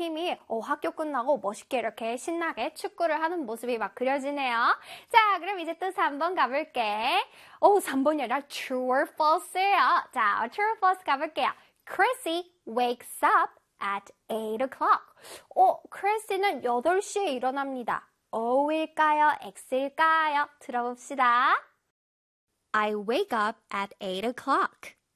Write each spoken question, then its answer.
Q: Chrissy wakes up at 8 o'clock.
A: 정답은 O가 돼야 되겠죠?